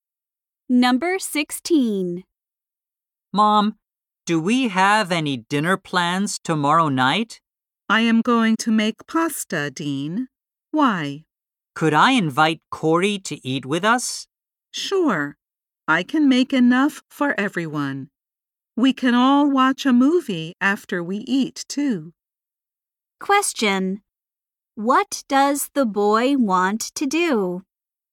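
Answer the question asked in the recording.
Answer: Invite Corey to dinner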